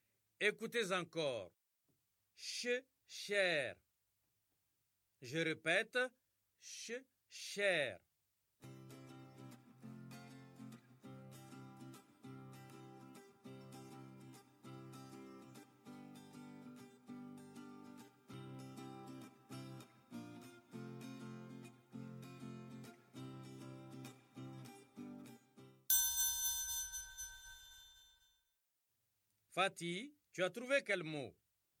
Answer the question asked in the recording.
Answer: Monsieur, ça cherche.